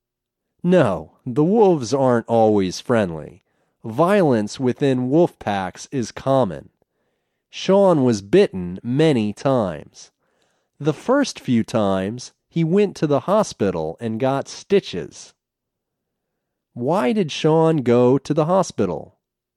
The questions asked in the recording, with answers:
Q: Why did Sean go to the hospital?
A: Sean went to the hospital to get stitches.